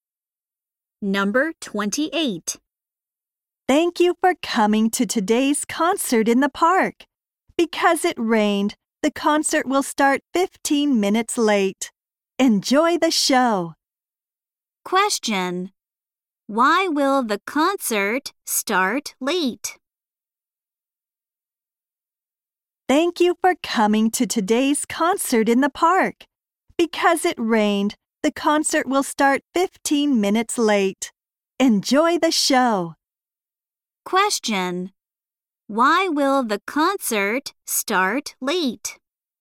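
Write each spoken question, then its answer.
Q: Why will the concert start late?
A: Because it rained.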